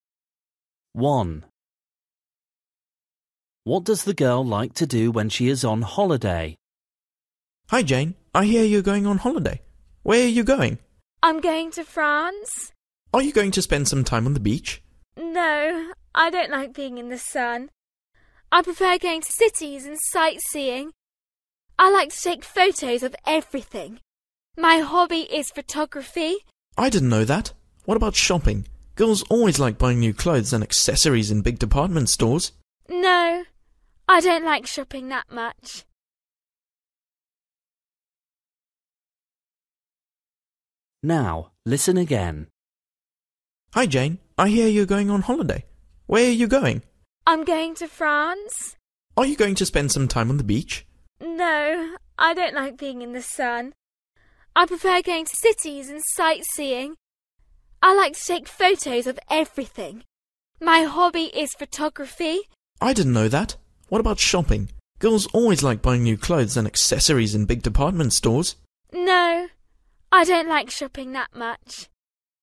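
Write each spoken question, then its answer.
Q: What does the girl like to do when she is on holiday?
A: Take photos (photography) and sightseeing in cities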